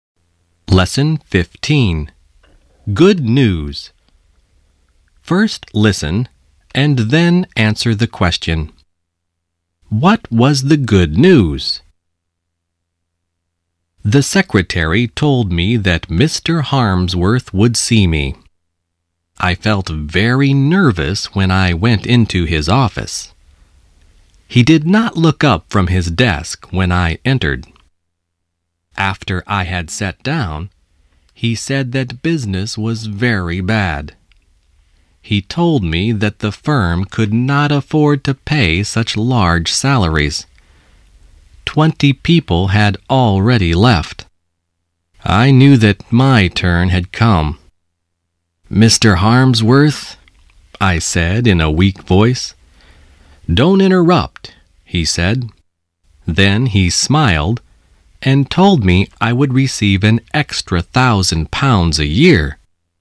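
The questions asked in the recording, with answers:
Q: What was the good news?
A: He would receive an extra £1,000 a year.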